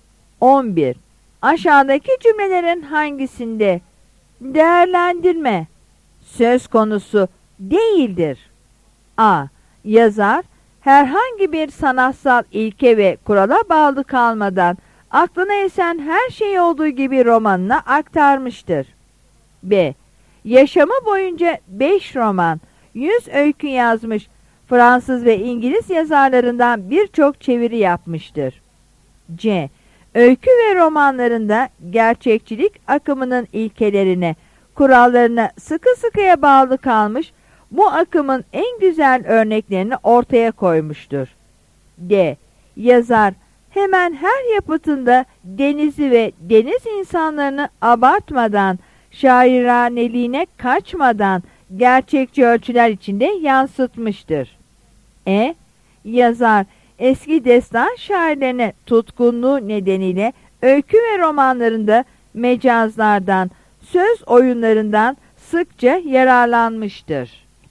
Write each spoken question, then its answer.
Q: Aşağıdaki cümlelerin hangisinde değerlendirme söz konusu değildir?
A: Yanıt B'dir.